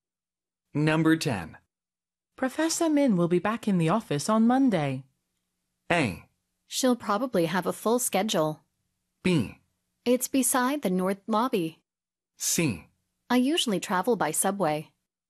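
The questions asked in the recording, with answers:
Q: Professor Min will be back in the office on Monday.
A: A: She'll probably have a full schedule.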